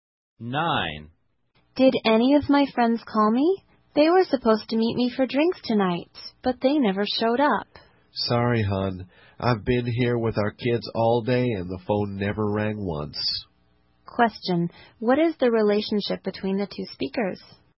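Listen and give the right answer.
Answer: Husband and wife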